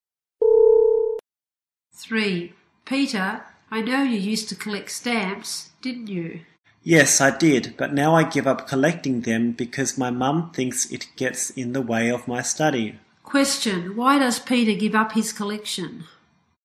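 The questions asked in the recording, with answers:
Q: Question, why does Peter give up his collection?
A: His mum thinks it gets in the way of his study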